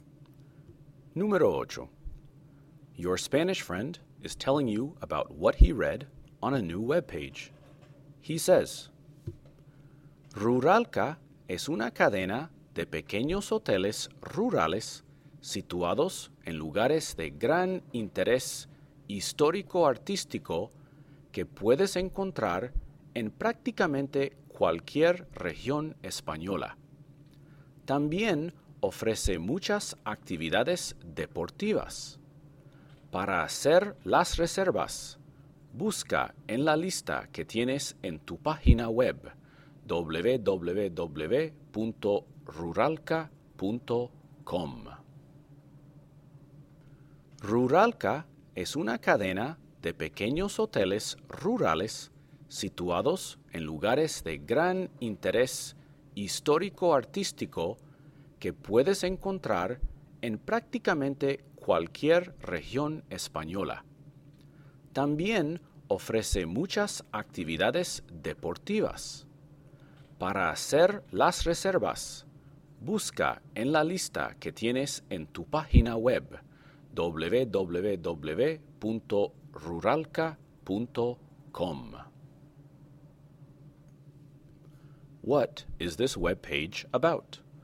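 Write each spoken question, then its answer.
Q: What is this web page about?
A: A chain of small rural hotels in places of historic and artistic interest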